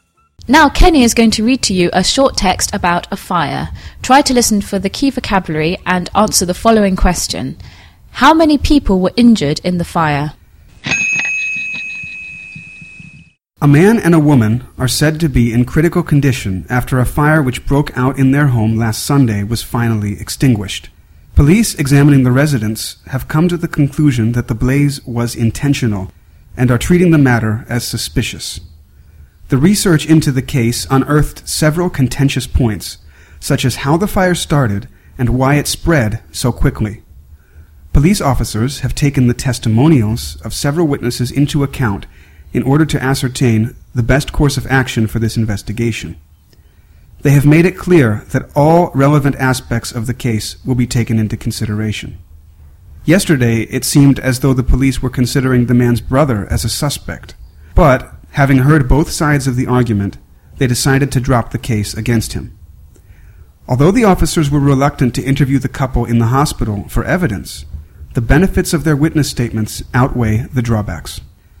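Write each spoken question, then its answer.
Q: How many people were injured in the fire?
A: Two (a man and a woman)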